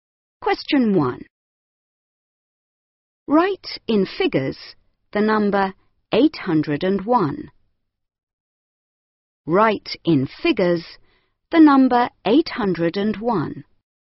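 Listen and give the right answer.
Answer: 801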